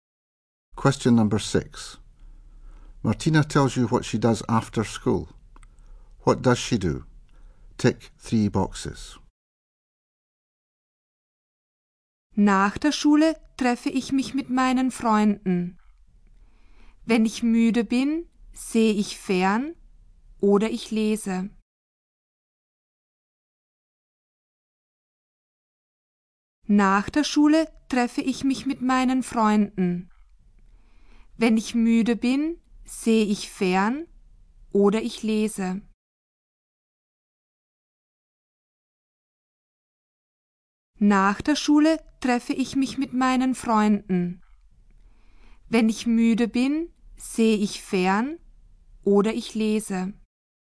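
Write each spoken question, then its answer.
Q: What does she do?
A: Meets her friends, watches TV or reads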